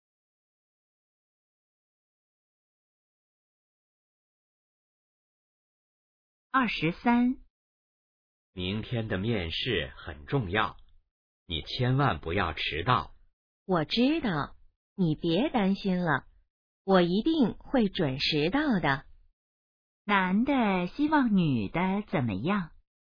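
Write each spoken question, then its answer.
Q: 男的希望女的怎么样?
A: 面试别迟到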